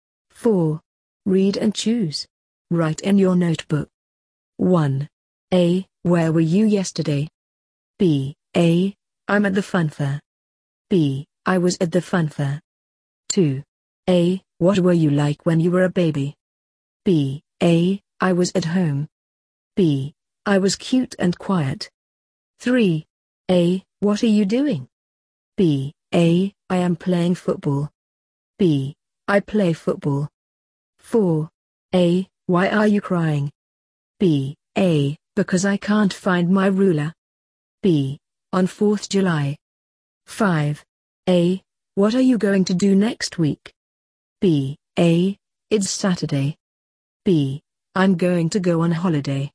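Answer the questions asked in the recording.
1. B: I was at the fun fair.
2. B: I was cute and quiet.
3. A: I am playing football.
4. A: Because I can't find my ruler.
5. B: I'm going to go on holiday.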